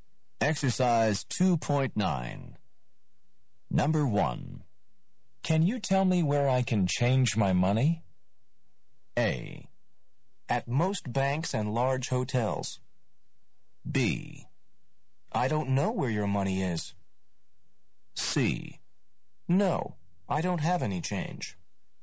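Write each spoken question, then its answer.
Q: Can you tell me where I can change my money?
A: A: At most banks and large hotels.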